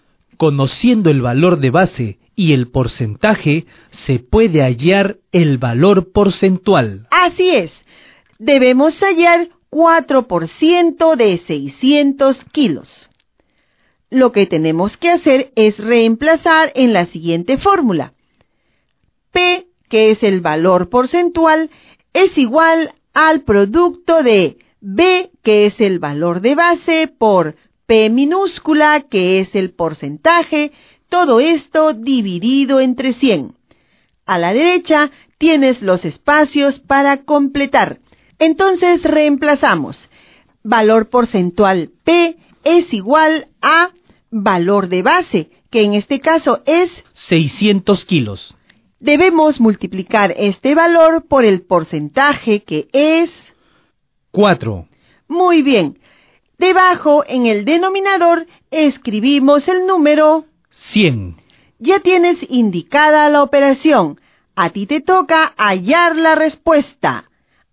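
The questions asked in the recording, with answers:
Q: Debemos hallar 4% de 600 kilos.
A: 24 kilos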